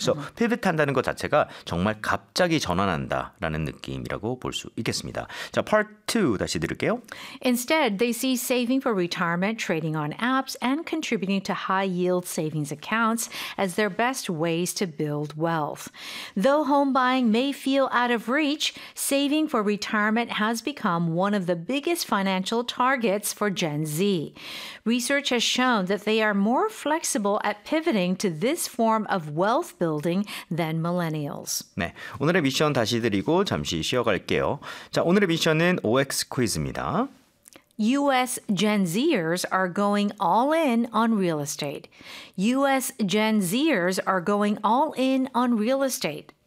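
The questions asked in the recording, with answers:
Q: U.S. Gen Zers are going all in on real estate.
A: X (false)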